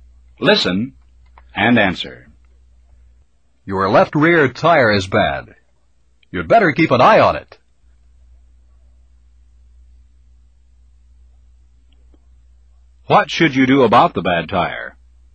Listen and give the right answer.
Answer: I'd better keep an eye on it.